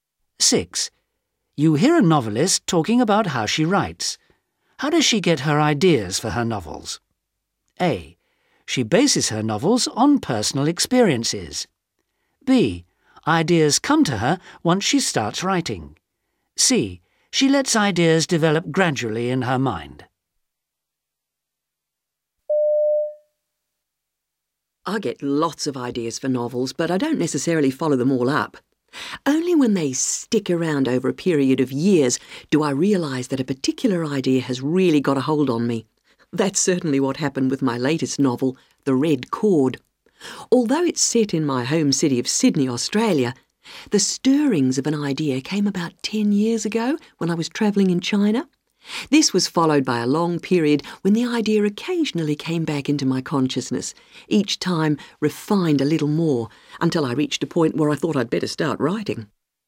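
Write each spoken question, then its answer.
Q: How does she get her ideas for her novels?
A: C: She lets ideas develop gradually in her mind.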